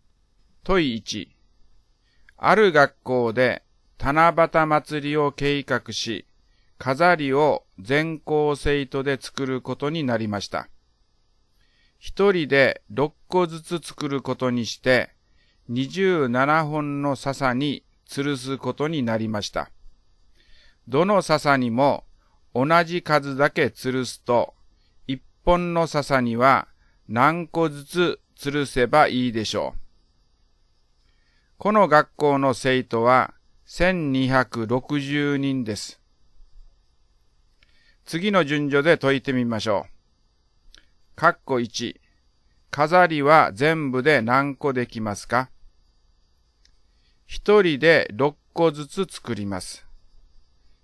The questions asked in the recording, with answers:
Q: 括弧1、飾りは全部で何個できますか?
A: 6×1260 は7560で、